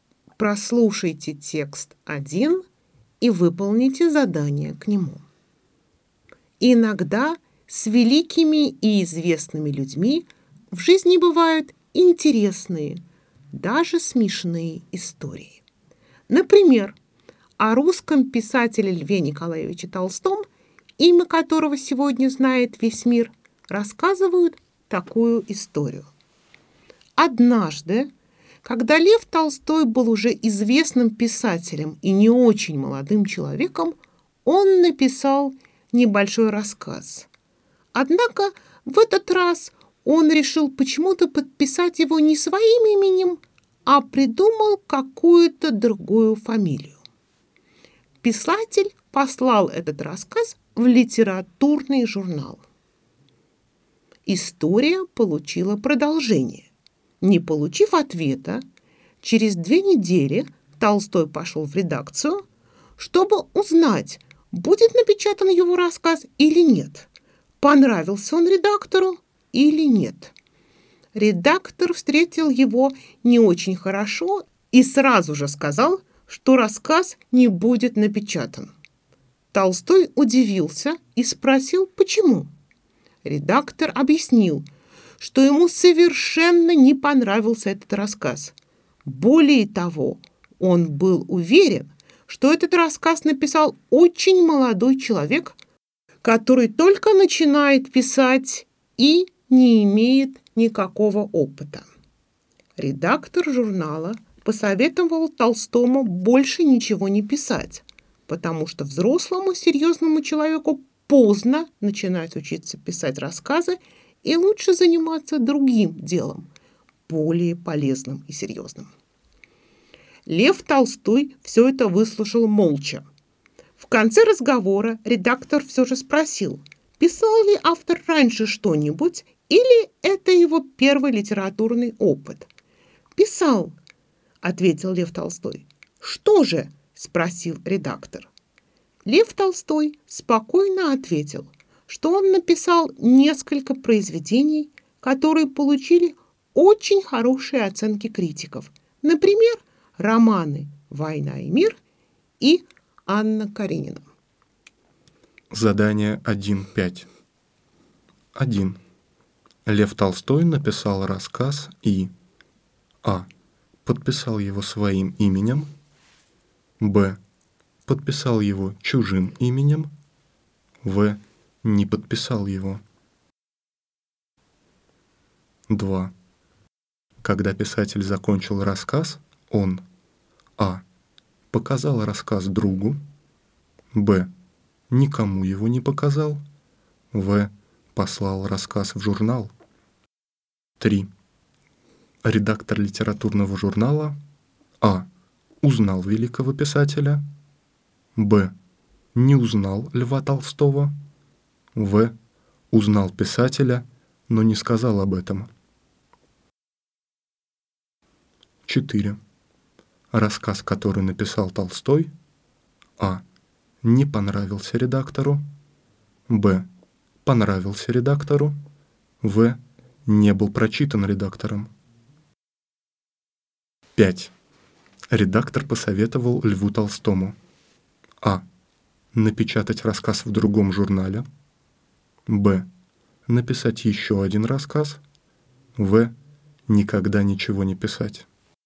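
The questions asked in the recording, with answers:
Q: Лев Толстой написал рассказ и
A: Б: Подписал его чужим именем.

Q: Когда писатель закончил рассказ, он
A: В: Послал рассказ в журнал.

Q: Редактор литературного журнала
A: Б: Не узнал Льва Толстого.

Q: Рассказ, который написал Толстой,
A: А: Не понравился редактору.

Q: Редактор посоветовал Льву Толстому.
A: В: Никогда ничего не писать.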